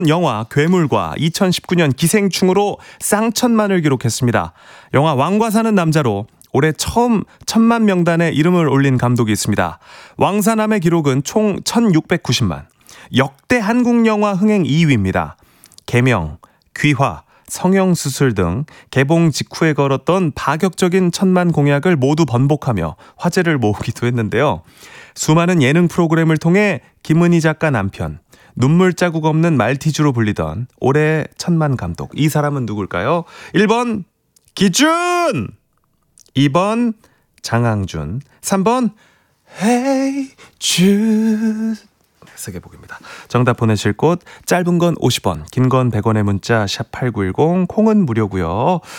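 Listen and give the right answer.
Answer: 2번: 장항준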